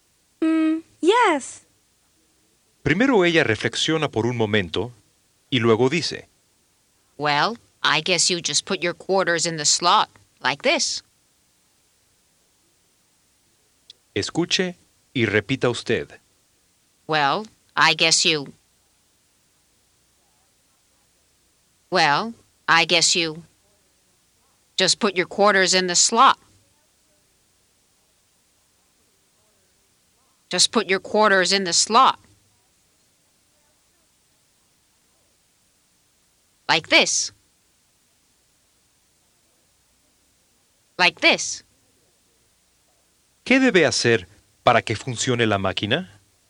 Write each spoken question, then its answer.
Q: ¿Qué debe hacer para que funcione la máquina?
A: Well, I guess you just put your quarters in the slot, like this.